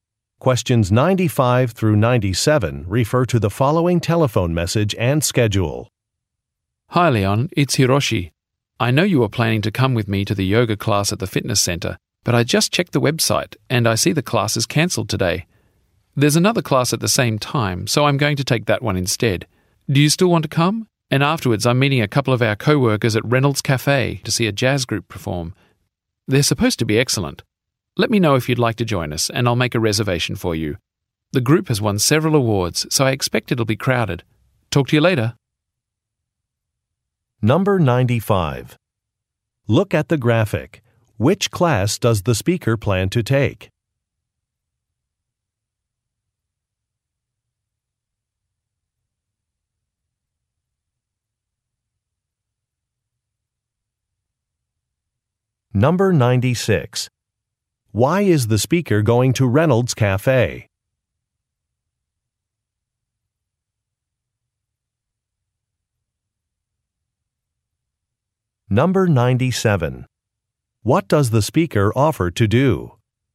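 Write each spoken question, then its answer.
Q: Why is the speaker going to Reynolds Cafe?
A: To see a jazz group perform

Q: What does the speaker offer to do?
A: Make a reservation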